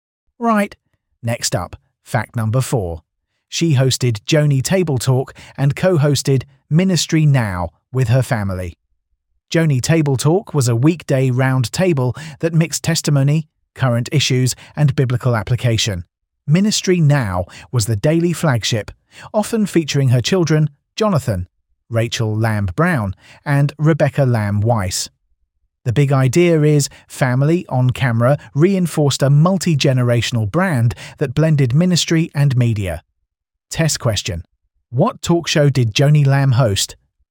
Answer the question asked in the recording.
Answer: Correct answer. Joni Table Talk.